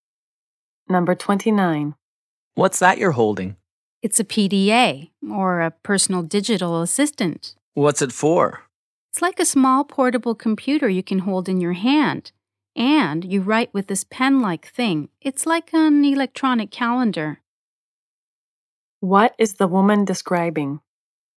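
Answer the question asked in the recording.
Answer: A PDA (personal digital assistant)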